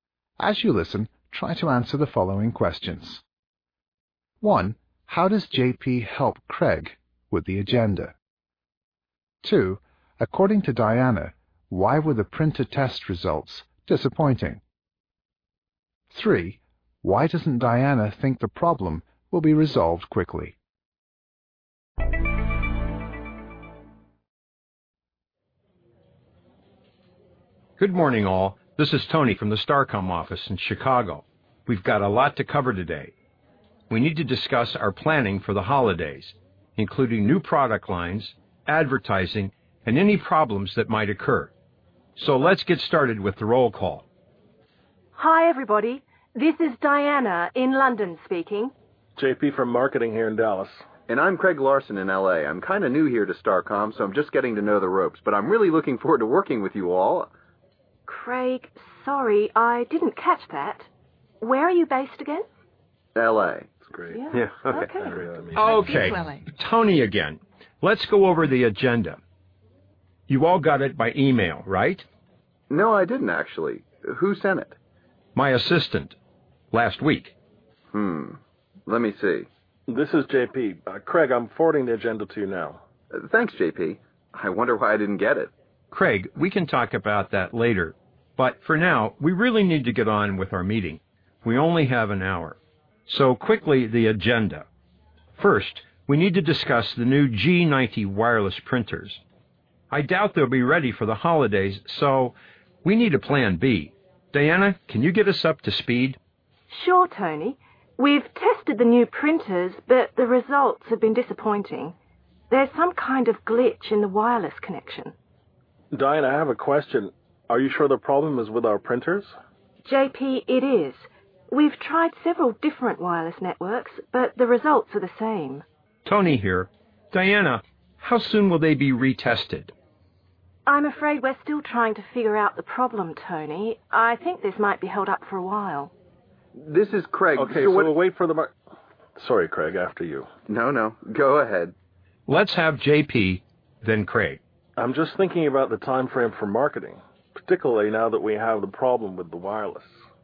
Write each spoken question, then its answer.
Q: How does JP help Craig with the agenda?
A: JP finally forwards or sends it to him by email.

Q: According to Diana, why were the printer test results disappointing?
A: Diana notes that there's a glitch or malfunction with the printer's wireless connection.